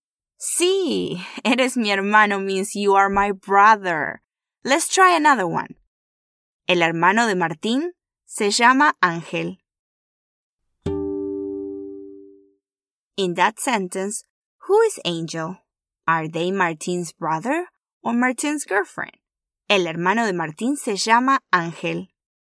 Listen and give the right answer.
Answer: Muy bien. El hermano de Martín es Martin's brother.